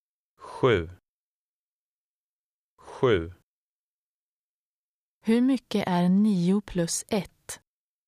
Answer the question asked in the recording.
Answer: 10. 10.